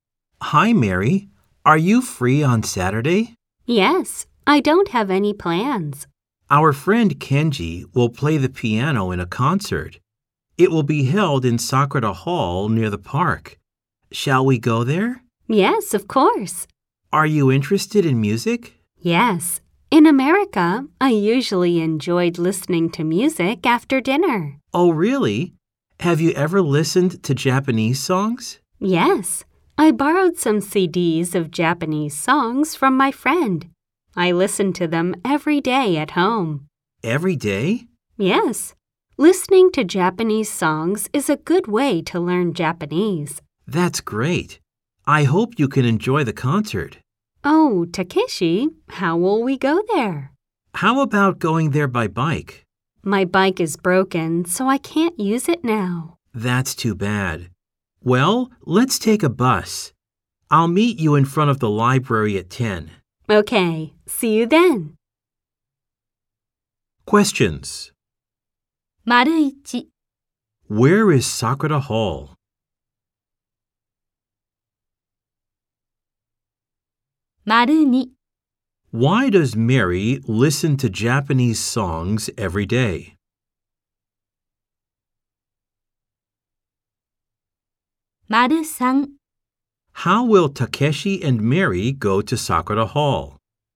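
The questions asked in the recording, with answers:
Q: Where is Sakura Hall?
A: Near the park.

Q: Why does Mary listen to Japanese songs every day?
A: Because it is a good way to learn Japanese.

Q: How will Takeshi and Mary go to Sakura Hall?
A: By bus.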